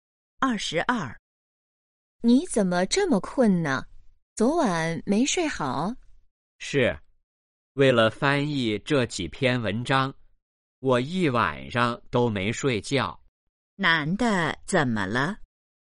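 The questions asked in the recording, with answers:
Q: 男的怎么了?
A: 一晚上没睡觉,很困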